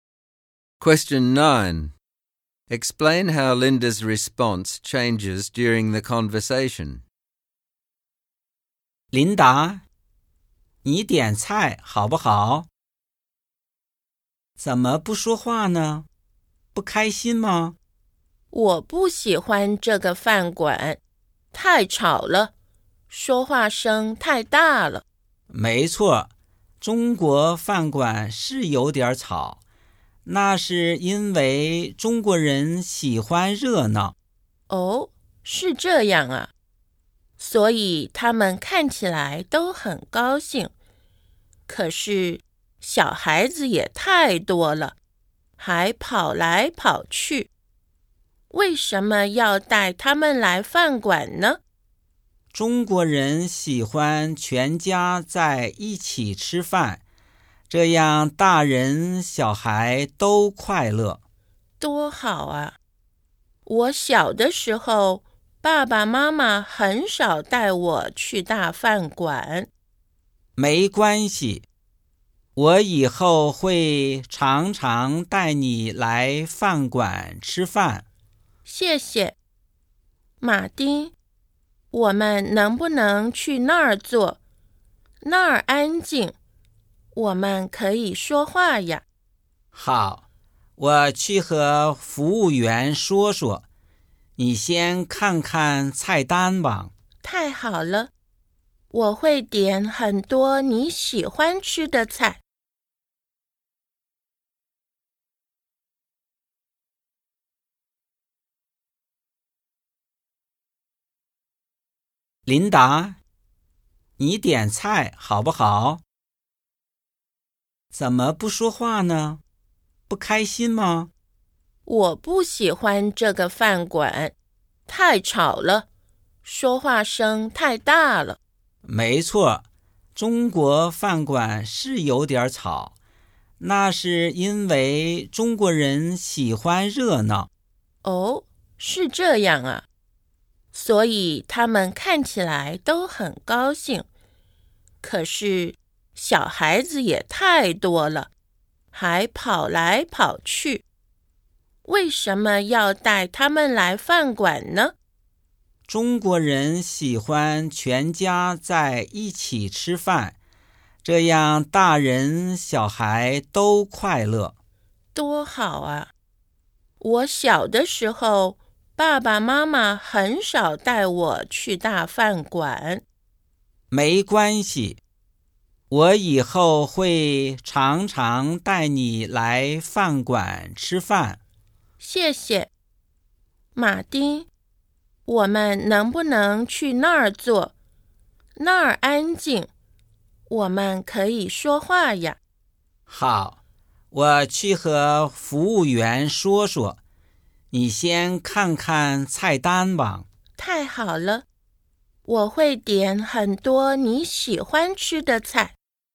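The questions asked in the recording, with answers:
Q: Explain how Linda's response changes during the conversation.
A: At first she is unhappy and complains about the noise and the children. After Martin explains Chinese customs, she becomes understanding and positive, and in the end she is happy.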